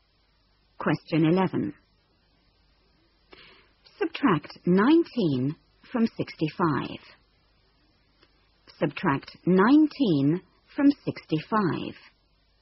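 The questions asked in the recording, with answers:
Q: Subtract 19 from 65.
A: 46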